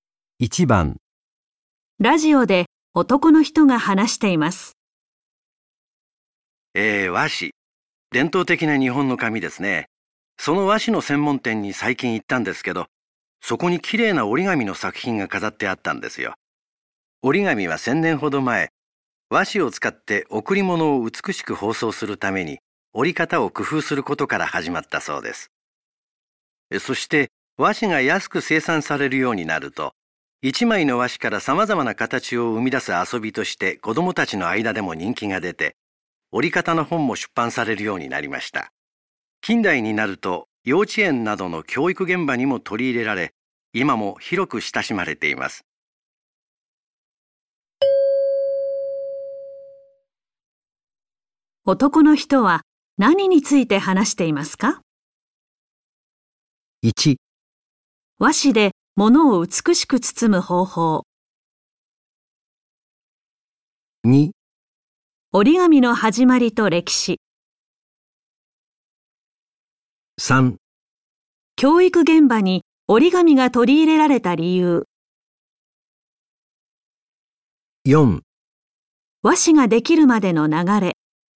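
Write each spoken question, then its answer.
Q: 男の人は何について話していますか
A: 2: 折り紙の始まりと歴史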